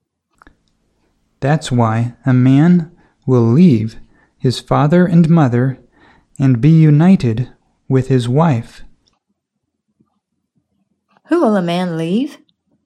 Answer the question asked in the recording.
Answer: A man will leave his father and mother.